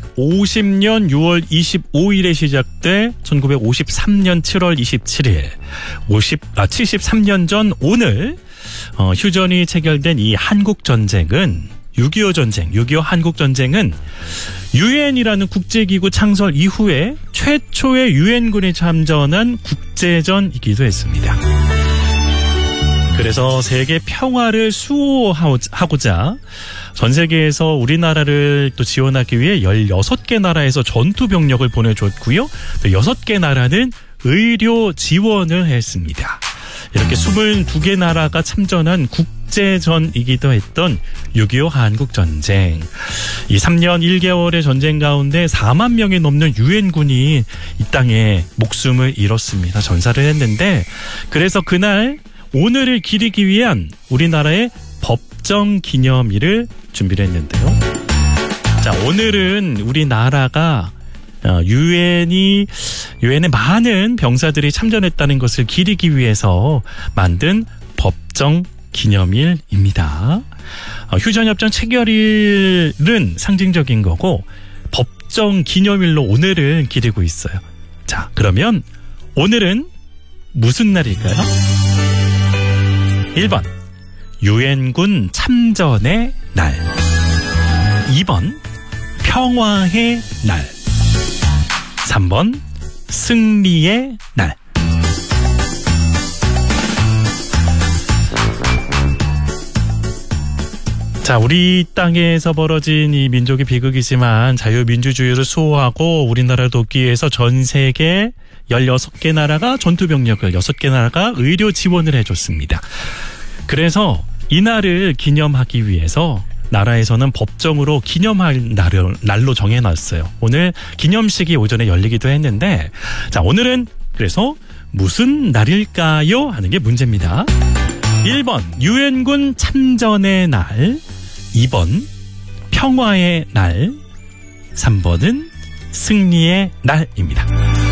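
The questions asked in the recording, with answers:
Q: 자, 그러면 오늘은 무슨 날일까요?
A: 1: 유엔군 참전의 날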